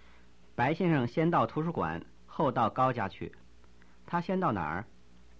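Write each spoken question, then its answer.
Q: 他先到哪儿?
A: 图书馆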